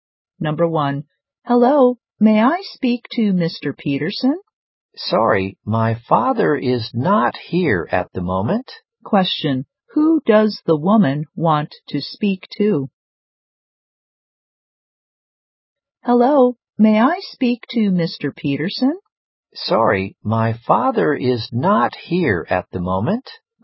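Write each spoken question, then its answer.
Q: Question, who does the woman want to speak to?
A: Mr. Peterson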